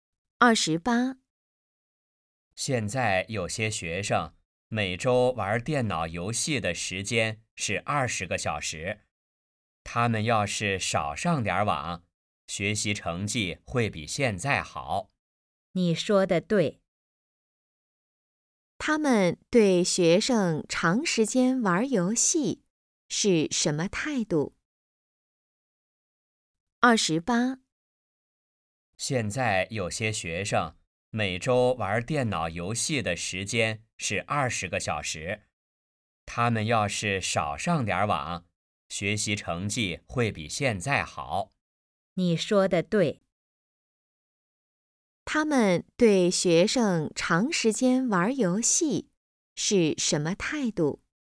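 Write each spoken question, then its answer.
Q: 他们对学生长时间玩游戏是什么态度?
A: 不支持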